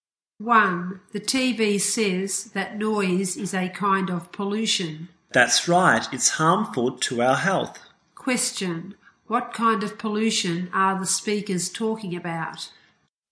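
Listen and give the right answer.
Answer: Noise pollution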